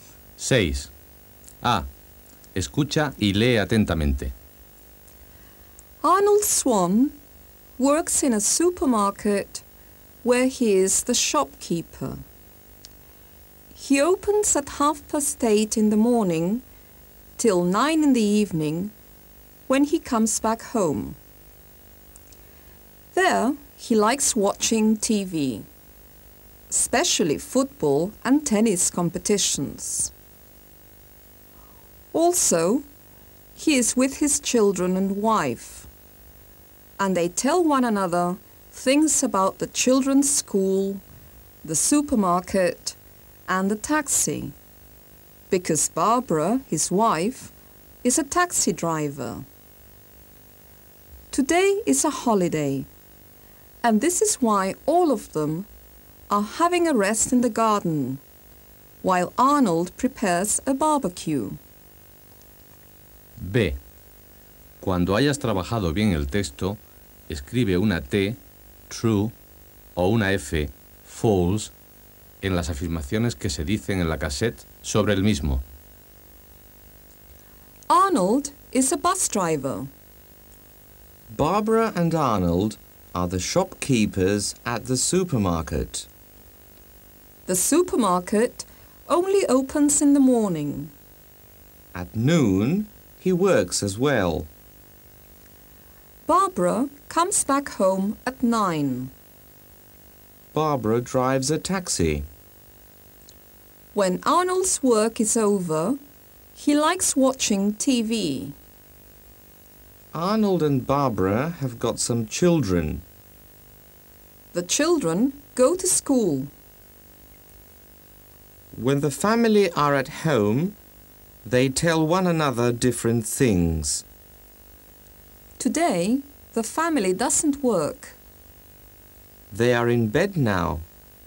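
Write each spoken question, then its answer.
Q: Arnold is a bus driver.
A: False

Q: Barbara and Arnold are the shopkeepers at the supermarket.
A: False

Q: The supermarket only opens in the morning.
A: False

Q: At noon, he works as well.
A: True

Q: Barbara drives a taxi.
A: True

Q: When Arnold's work is over, he likes watching TV.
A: True

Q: Arnold and Barbara have got some children.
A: True

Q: The children go to school.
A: True

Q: When the family are at home, they tell one another different things.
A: True

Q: Today, the family doesn't work.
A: True

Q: They are in bed now.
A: False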